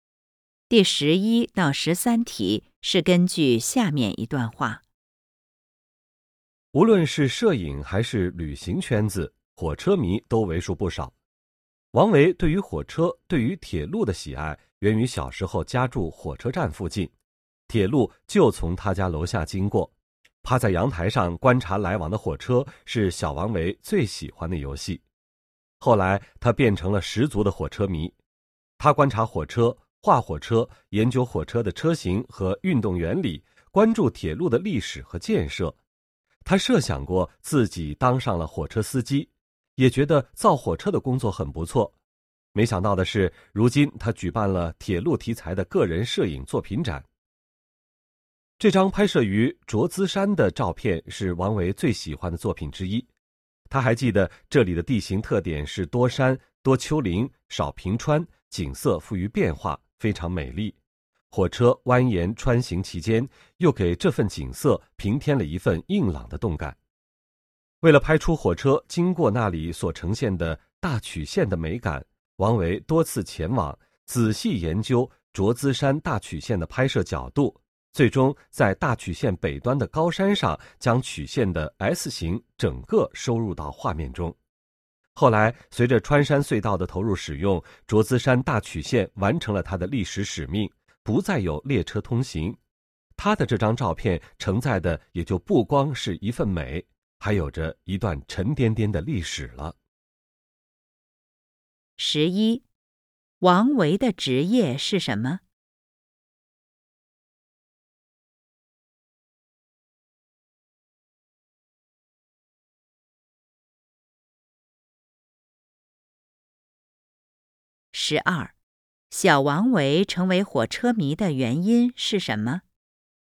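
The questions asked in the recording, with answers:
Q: 小王维成为火车迷的原因是什么?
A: 小时候家住火车站附近,铁路从他家楼下经过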